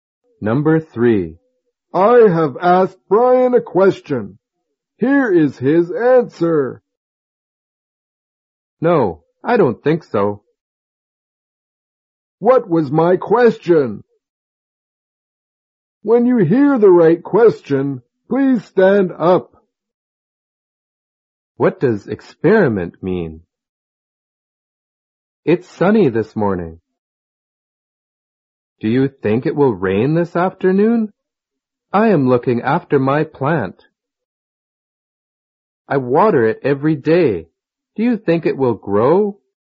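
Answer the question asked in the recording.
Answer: It's sunny this morning. Do you think it will rain this afternoon?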